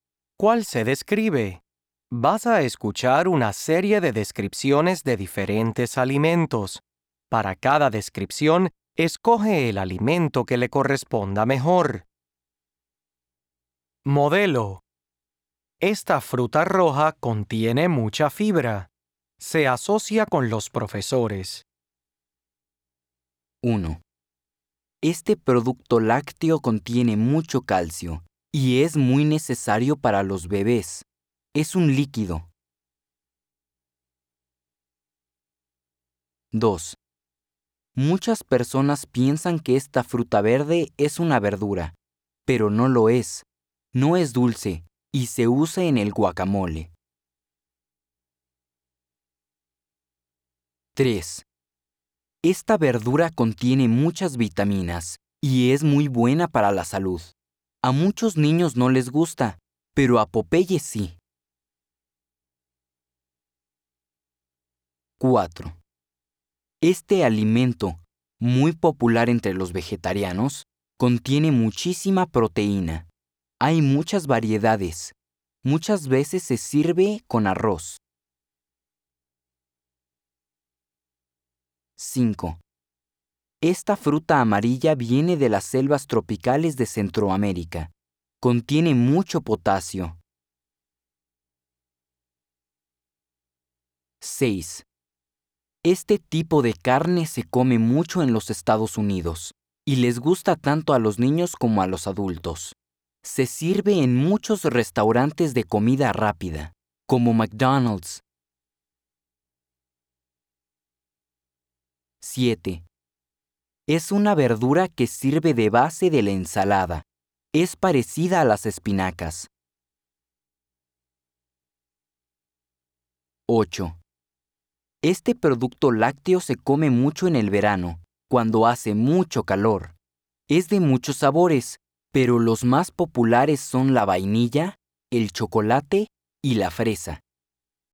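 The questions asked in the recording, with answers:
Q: Este producto lácteo contiene mucho calcio y es muy necesario para los bebés. Es un líquido.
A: la leche

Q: Muchas personas piensan que esta fruta verde es una verdura, pero no lo es. No es dulce y se usa en el guacamole.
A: el aguacate

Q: Esta verdura contiene muchas vitaminas y es muy buena para la salud. A muchos niños no les gusta, pero a Popeye sí.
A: las espinacas

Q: Esta fruta amarilla viene de las selvas tropicales de Centroamérica. Contiene mucho potasio.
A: el plátano (la banana)

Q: Es una verdura que sirve de base de la ensalada. Es parecida a las espinacas.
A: la lechuga

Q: Este producto lácteo se come mucho en el verano, cuando hace mucho calor. Es de muchos sabores, pero los más populares son la vainilla, el chocolate y la fresa.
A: el helado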